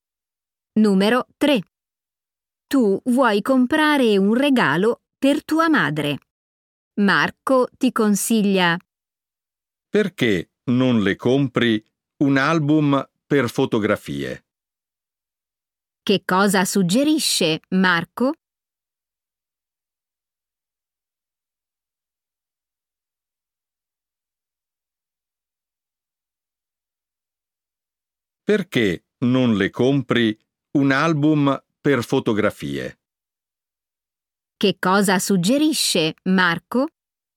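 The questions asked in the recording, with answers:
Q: Che cosa suggerisce Marco?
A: un album per fotografie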